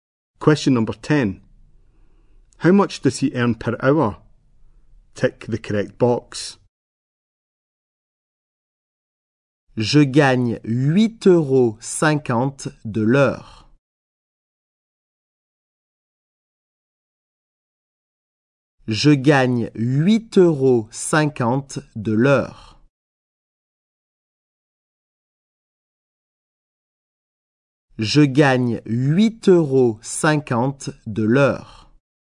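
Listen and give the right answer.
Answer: 8.50 euros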